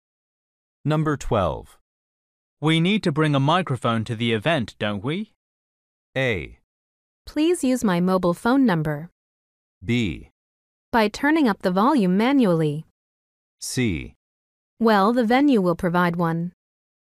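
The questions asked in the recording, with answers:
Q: We need to bring a microphone to the event, don't we?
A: C: Well, the venue will provide one.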